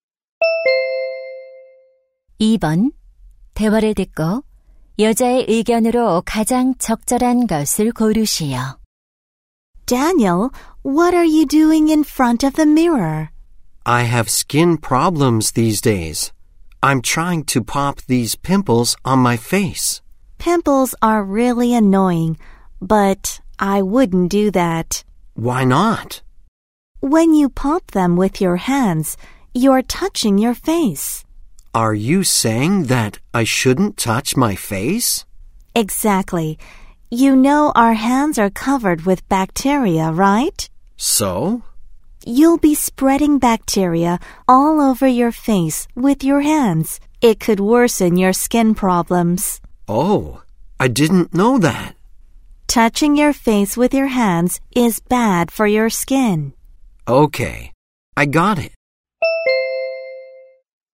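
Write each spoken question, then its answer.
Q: 대화를 듣고 여자의 의견으로 가장 적절한 것을 고르시오.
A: 손으로 얼굴을 만지는 것은 피부에 나쁘다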